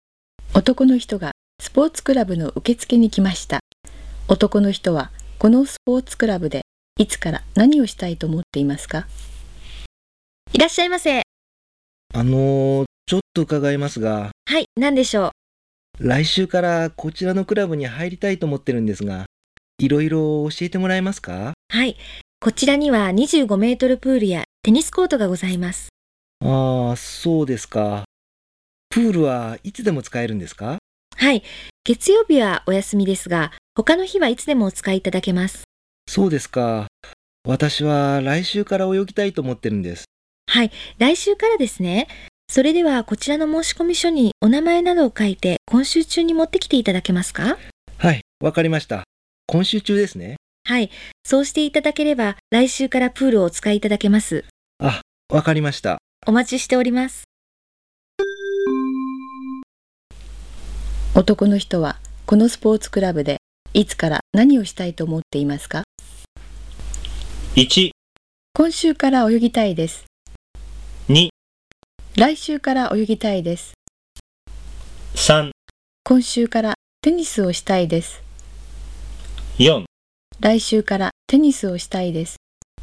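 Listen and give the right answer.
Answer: 2: 来週から泳ぎたいです。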